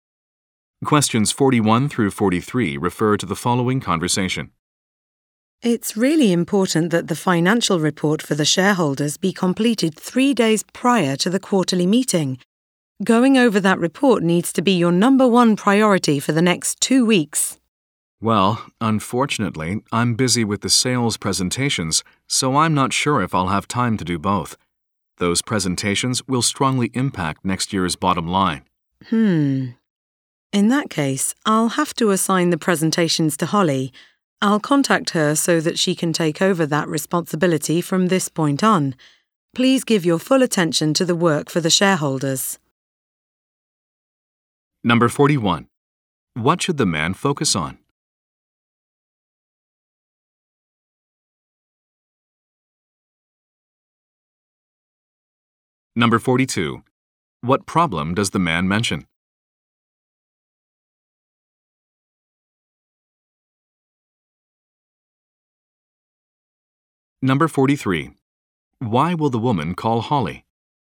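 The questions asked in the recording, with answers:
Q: What should the man focus on?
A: The financial report for the shareholders

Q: What problem does the man mention?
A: He is busy with the sales presentations

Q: Why will the woman call Holly?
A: To assign her the sales presentations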